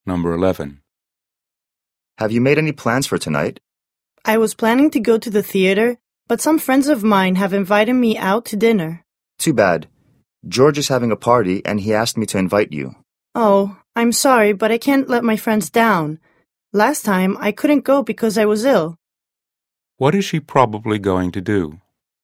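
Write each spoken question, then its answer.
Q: What is she probably going to do?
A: Go out to dinner with her friends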